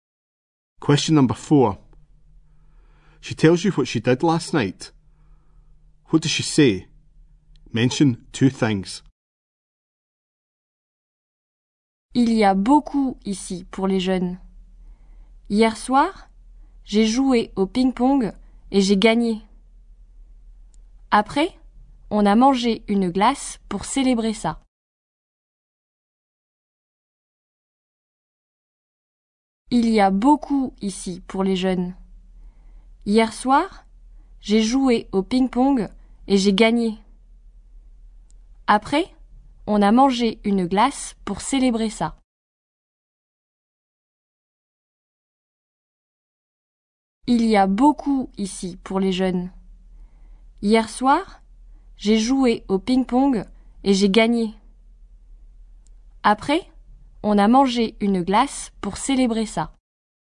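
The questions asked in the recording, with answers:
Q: What does she say? Mention two things.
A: She played table tennis and won; afterwards they ate an ice cream to celebrate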